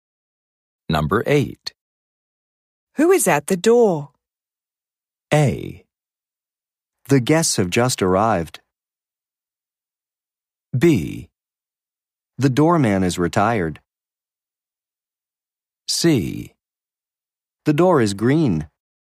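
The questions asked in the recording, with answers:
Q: Who is at the door?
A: A: The guests have just arrived.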